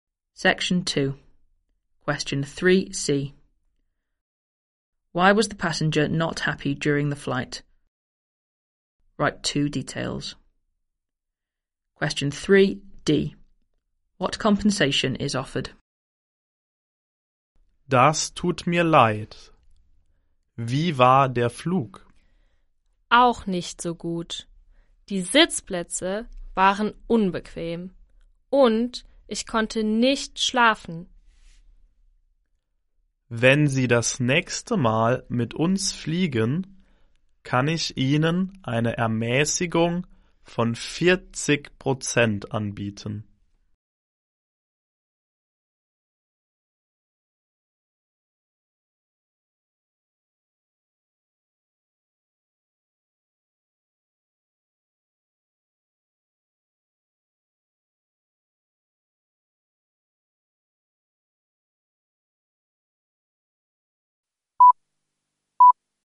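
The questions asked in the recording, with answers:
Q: Why was the passenger not happy during the flight?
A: The seats were uncomfortable and he couldn't sleep

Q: What compensation is offered?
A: A 40% discount on the next flight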